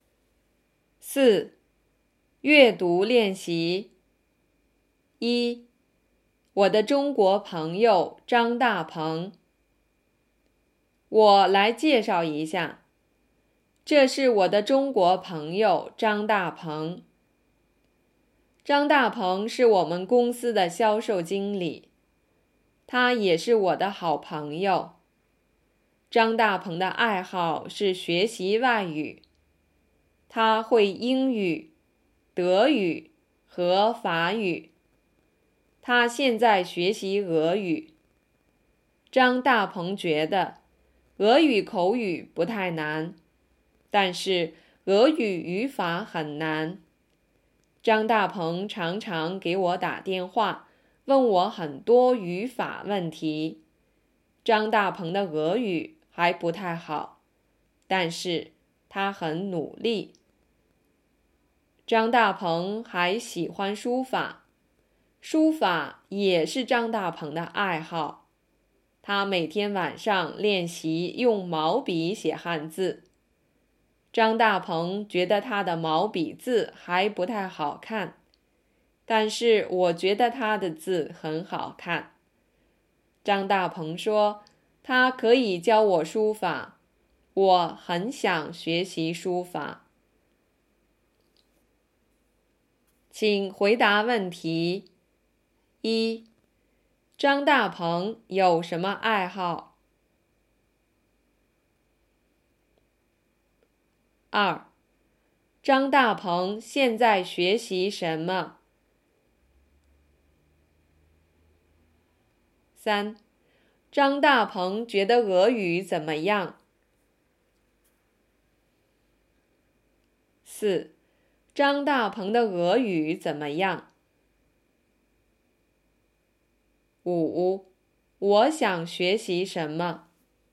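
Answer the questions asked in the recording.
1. 学习外语和书法
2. 俄语
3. 口语不太难,但是语法很难
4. 还不太好,但是他很努力
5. 书法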